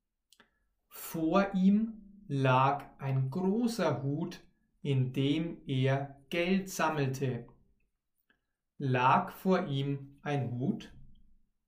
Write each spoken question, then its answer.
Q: Lag vor ihm ein Hut?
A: Ja, vor ihm lag ein Hut.